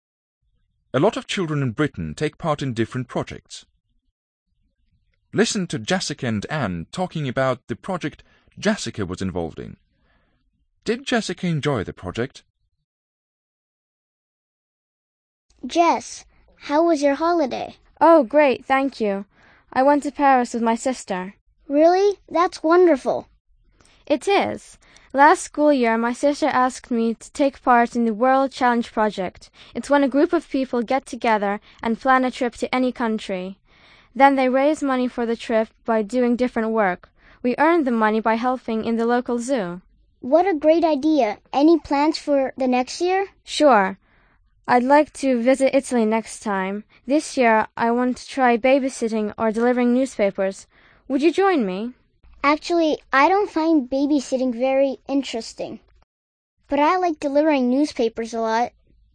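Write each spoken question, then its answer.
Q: Did Jessica enjoy the project?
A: Yes, she did.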